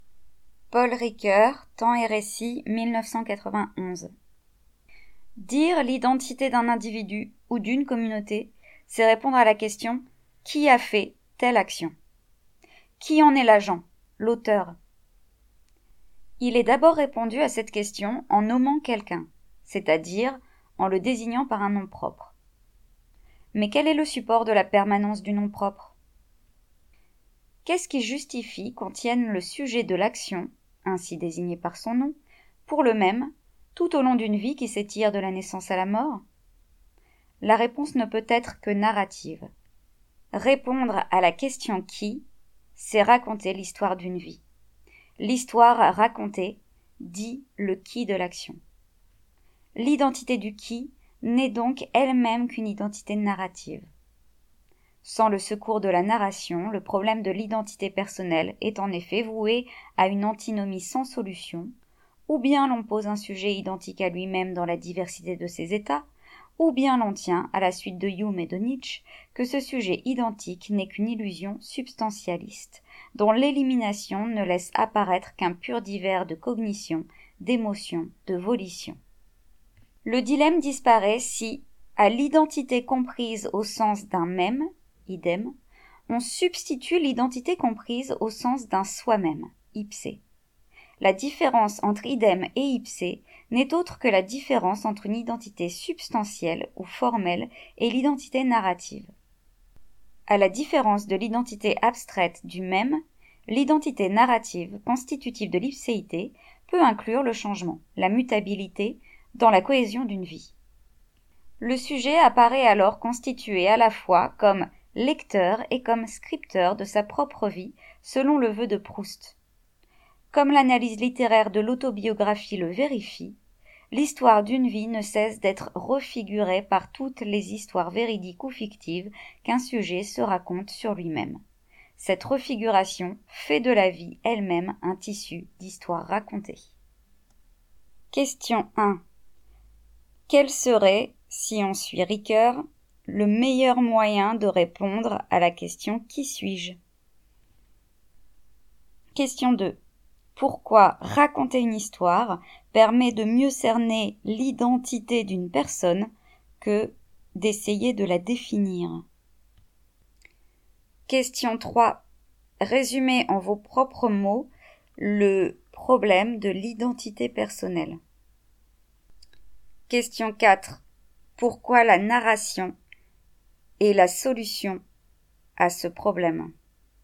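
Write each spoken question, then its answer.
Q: Quel serait, si on suit Ricoeur, le meilleur moyen de répondre à la question « Qui suis-je ?»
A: Raconter l'histoire de sa vie

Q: Pourquoi raconter une histoire permet de mieux cerner l'identité d'une personne que d'essayer de la définir ?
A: Parce que l'identité narrative peut inclure le changement et la mutabilité dans la cohésion d'une vie, contrairement à l'identité abstraite du même

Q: Résumez en vos propres mots le problème de l'identité personnelle.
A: Une antinomie : soit on pose un sujet identique à lui-même dans la diversité de ses états, soit ce sujet n'est qu'une illusion et il ne reste qu'un pur divers de cognitions, d'émotions et de volitions

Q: Pourquoi la narration et la solution à ce problème.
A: Elle remplace l'identité comme « même » (idem) par l'identité comme « soi-même » (ipse), qui intègre le changement dans la cohésion d'une vie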